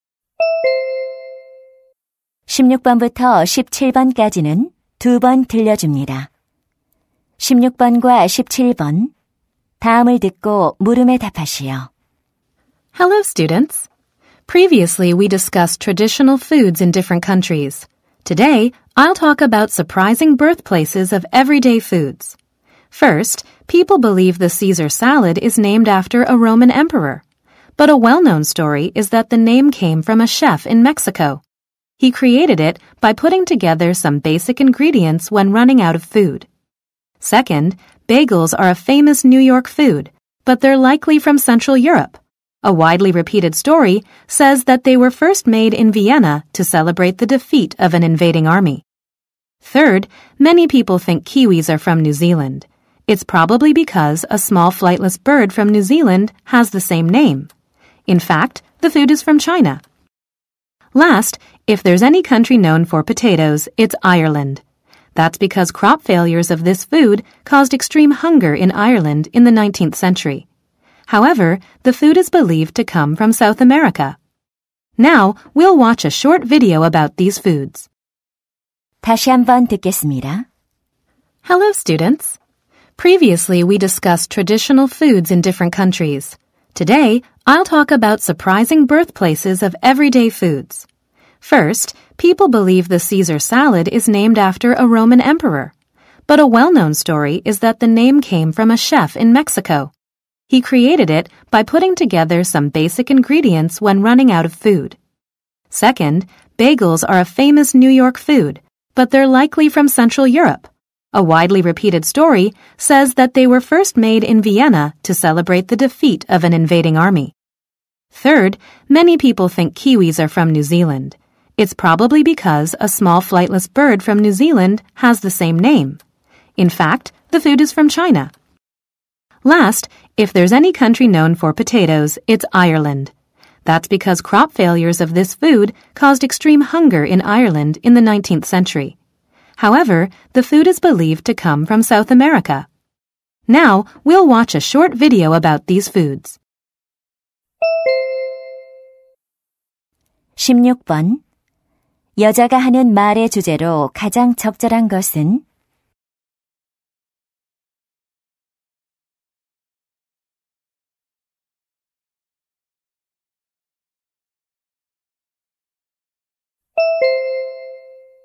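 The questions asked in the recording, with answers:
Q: 여자가 하는 말의 주제로 가장 적절한 것은?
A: 일상 음식들의 의외의 원산지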